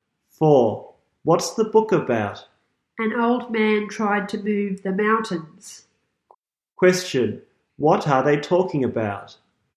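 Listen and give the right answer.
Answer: A book about an old man who tried to move the mountains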